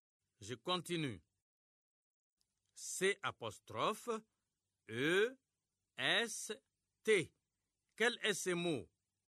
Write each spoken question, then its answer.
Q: Quel est ce mot?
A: J'espère que vous avez trouvé c'est.